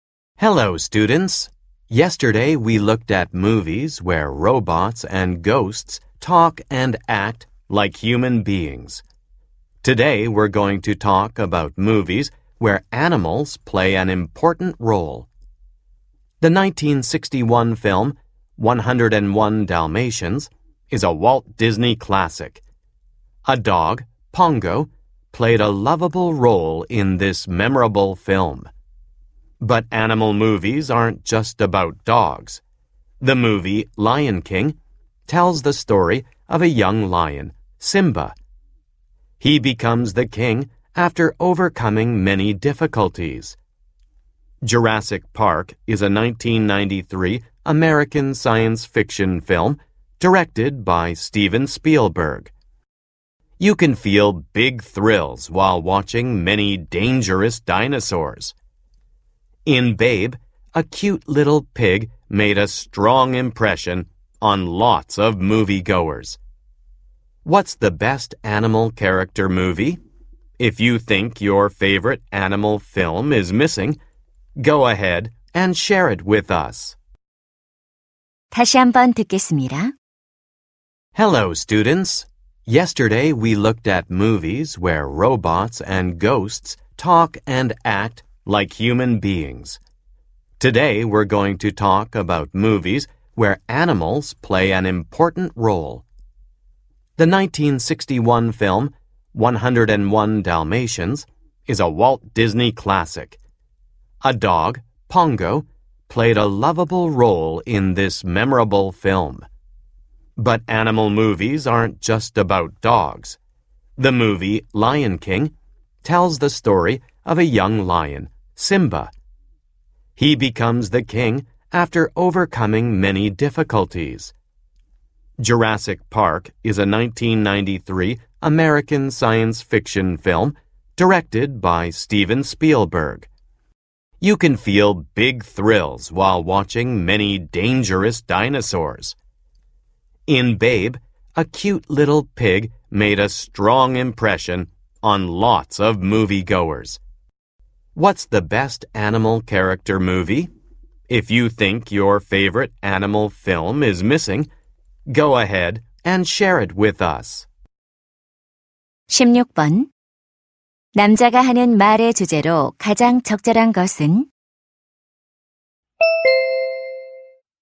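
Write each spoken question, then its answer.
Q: 남자가 하는 말의 주제로 가장 적절한 것은?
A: 동물이 중요한 역할을 하는 영화들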